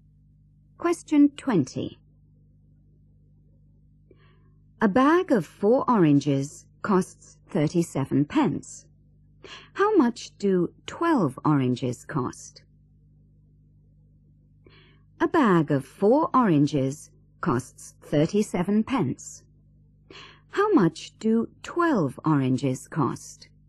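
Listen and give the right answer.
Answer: £1.11 (111 pence)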